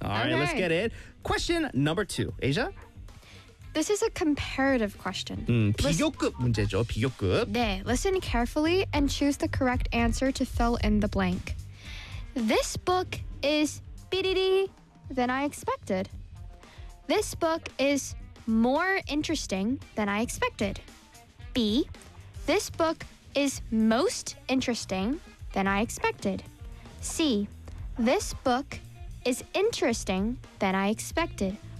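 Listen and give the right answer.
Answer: A: This book is more interesting than I expected.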